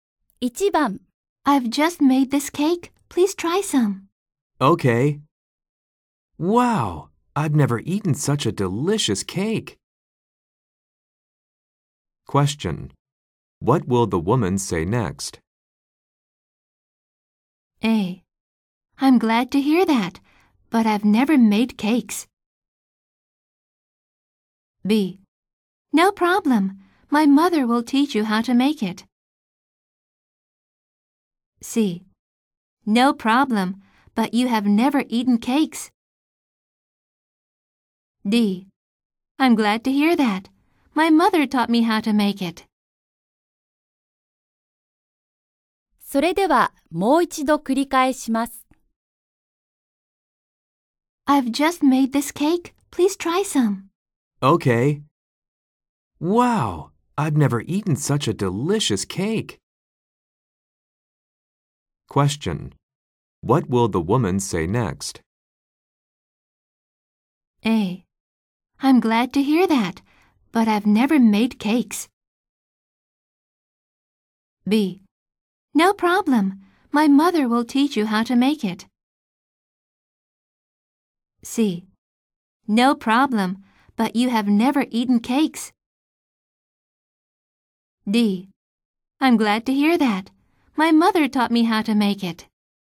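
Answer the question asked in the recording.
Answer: D: I'm glad to hear that. My mother taught me how to make it.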